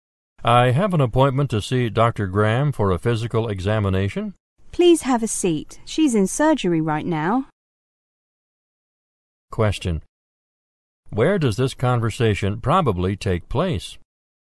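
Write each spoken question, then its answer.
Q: Where does this conversation probably take place?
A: In a doctor's office.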